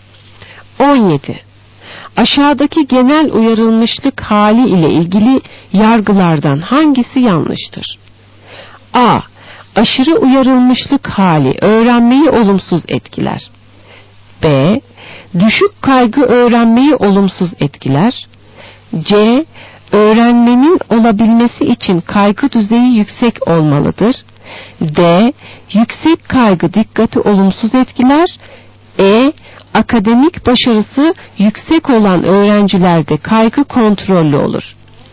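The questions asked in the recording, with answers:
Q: Aşağıdaki genel uyarılmışlık hali ile ilgili yargılardan hangisi yanlıştır?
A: C: Öğrenmenin olabilmesi için kaygı düzeyi yüksek olmalıdır.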